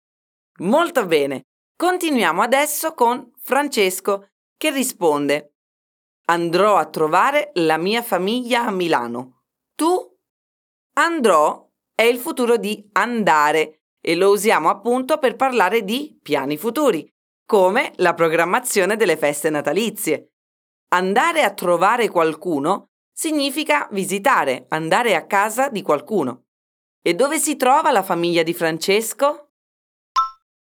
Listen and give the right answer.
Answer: A Milano!